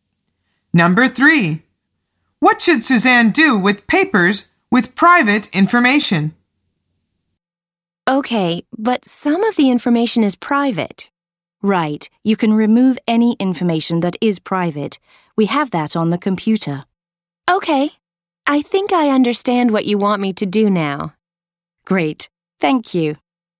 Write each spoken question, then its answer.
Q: What should Suzanne do with papers with private information?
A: The answer is remove the private information.